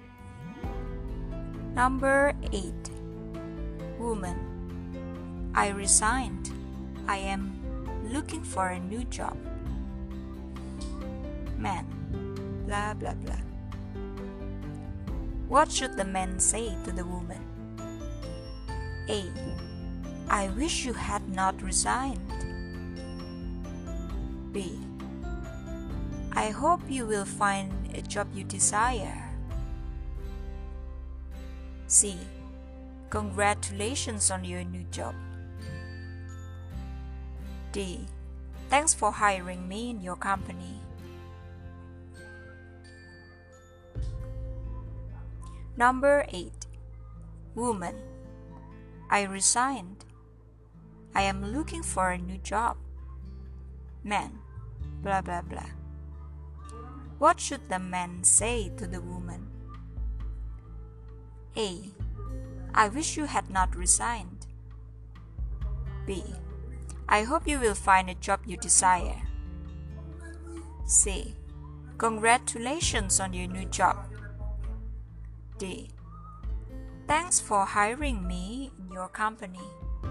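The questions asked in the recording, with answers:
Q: What should the man say to the woman?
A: B: I hope you will find a job you desire.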